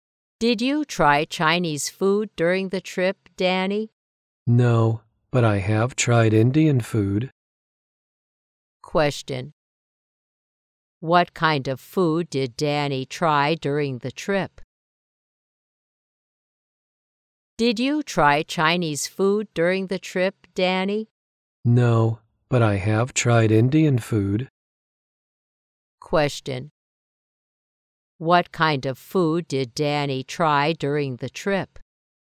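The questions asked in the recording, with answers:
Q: What kind of food did Danny try during the trip?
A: Indian food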